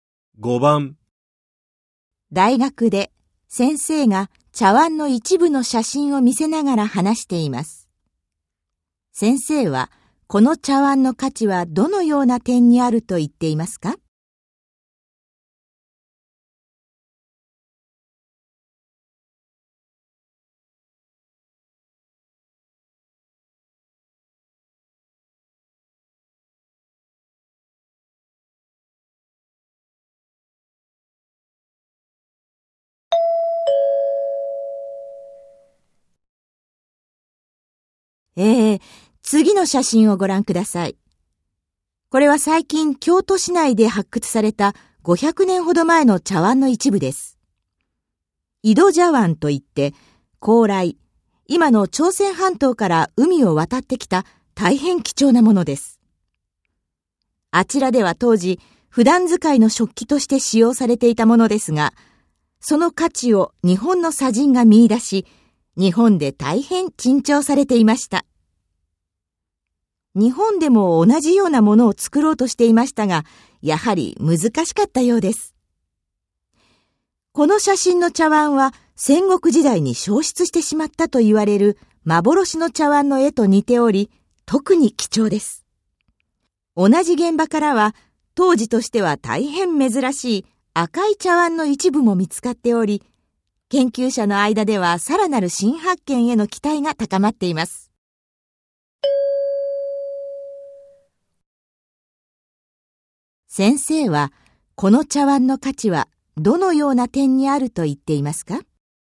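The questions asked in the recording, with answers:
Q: 先生はこの茶碗の価値はどのような点にあると言っていますか?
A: 戦国時代に消失したと言われる幻の茶碗の絵と似ている点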